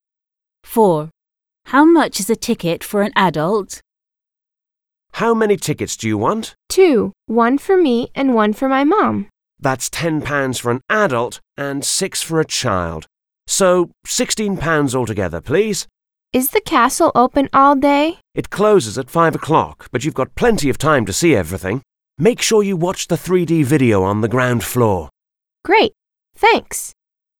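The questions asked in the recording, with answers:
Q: How much is a ticket for an adult?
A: £10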